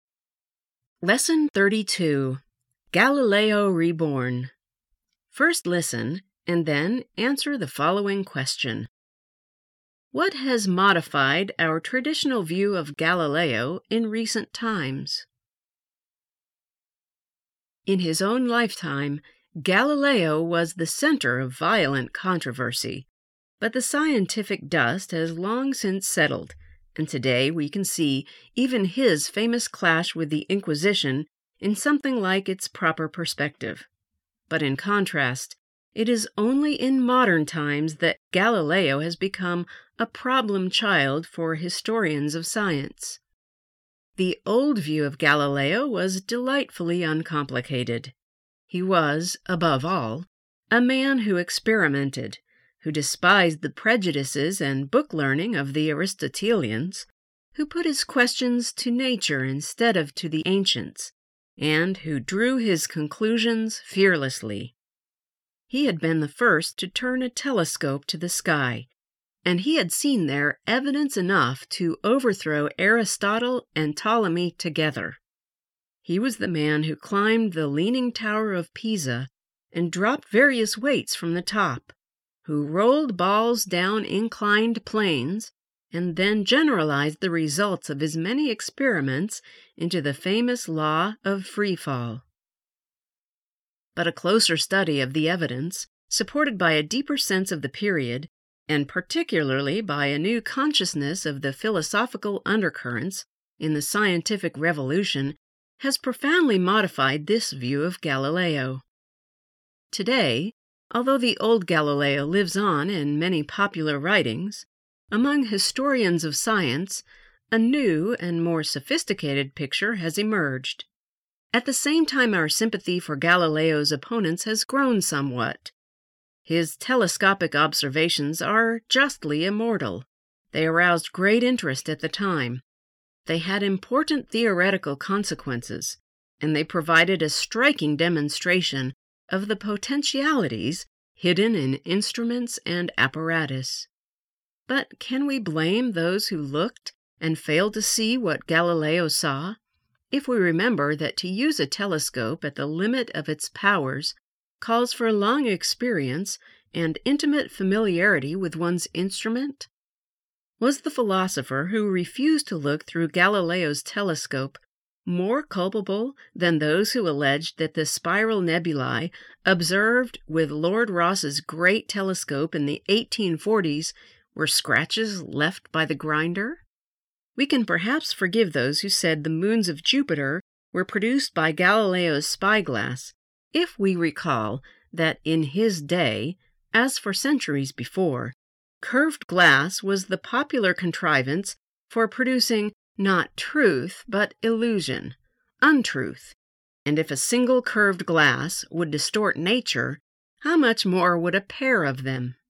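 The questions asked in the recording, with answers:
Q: What has modified our traditional view of Galileo in recent times?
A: A closer study of the evidence, a deeper sense of the period, and a new awareness of the philosophical undercurrents in the scientific revolution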